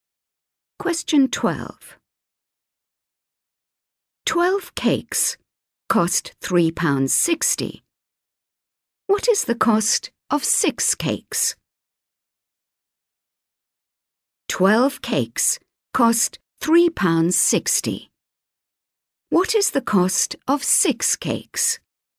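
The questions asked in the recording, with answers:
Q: 12 cakes cost £3.60. What is the cost of 6 cakes?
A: £1.80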